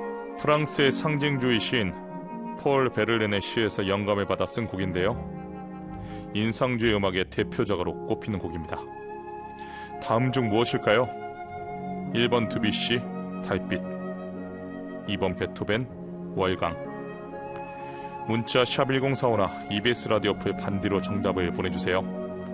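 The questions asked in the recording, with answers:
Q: 다음 중 무엇일까요?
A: 1: 드뷔시 달빛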